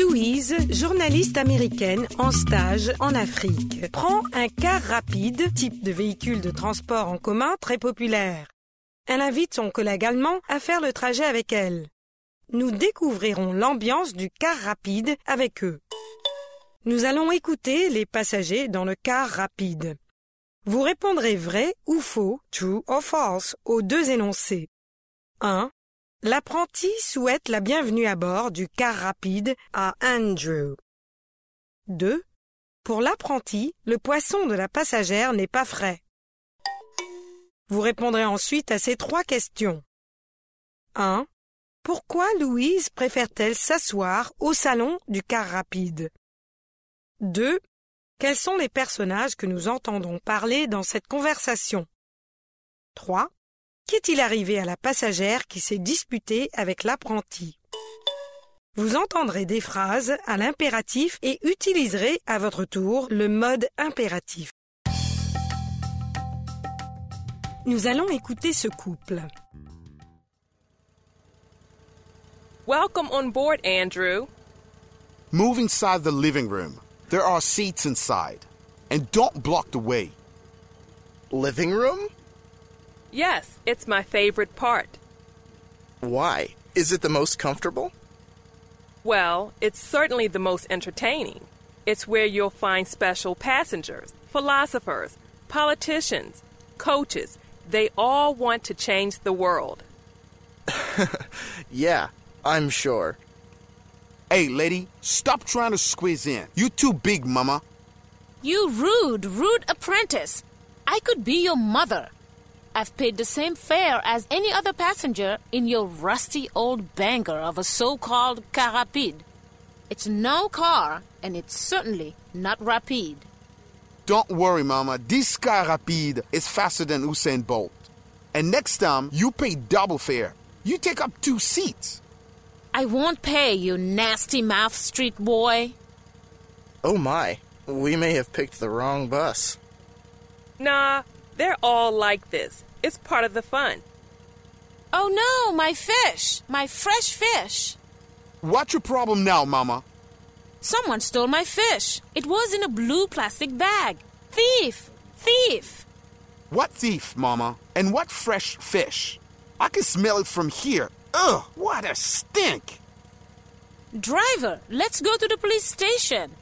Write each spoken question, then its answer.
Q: Pour l'apprenti, le poisson de la passagère n'est pas frais.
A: L'énoncé 2 est vrai.

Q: Pourquoi Louise préfère-t-elle s'asseoir au salon du car rapide?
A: C'est son endroit préféré.

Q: Quels sont les personnages que nous entendons parler dans cette conversation?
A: Louise, Andrew, l'apprenti et la passagère.

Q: Qu'est-il arrivé à la passagère qui s'est disputée avec l'apprenti?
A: Quelqu'un est descendu avec son poisson frais.